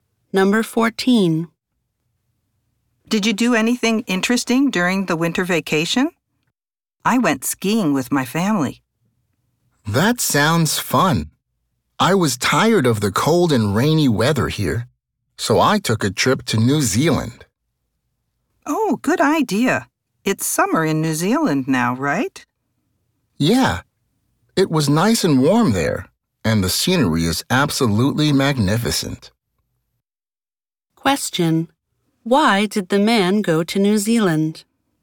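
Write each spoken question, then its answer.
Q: Why did the man go to New Zealand?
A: He was tired of the cold and rainy weather at home.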